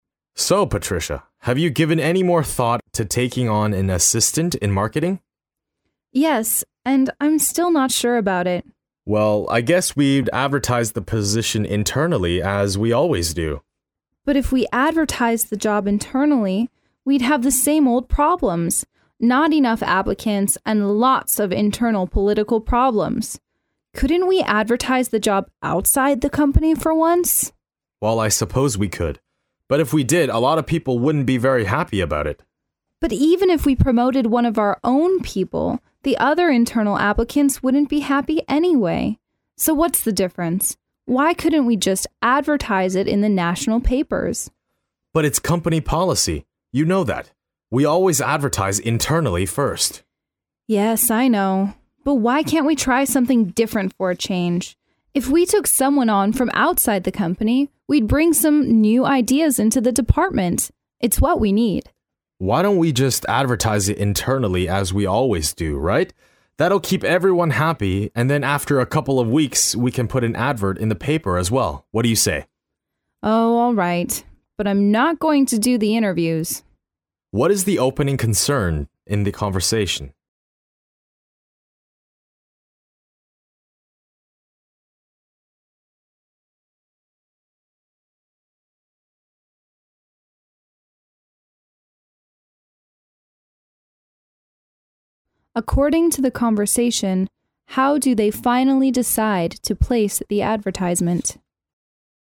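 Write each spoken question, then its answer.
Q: What is the opening concern in the conversation?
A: Whether to take on an assistant in marketing

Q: According to the conversation, how do they finally decide to place the advertisement?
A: Internally first, then in the paper after a couple of weeks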